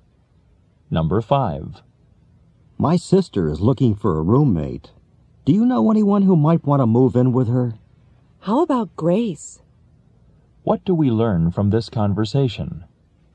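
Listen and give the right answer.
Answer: The woman suggests Grace as a roommate for the man's sister.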